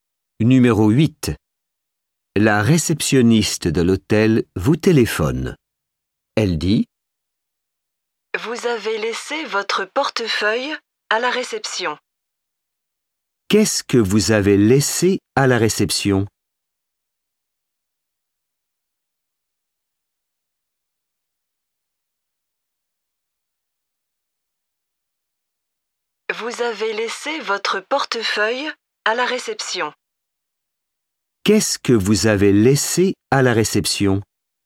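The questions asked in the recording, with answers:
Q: Qu'est-ce que vous avez laissé à la réception?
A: Votre portefeuille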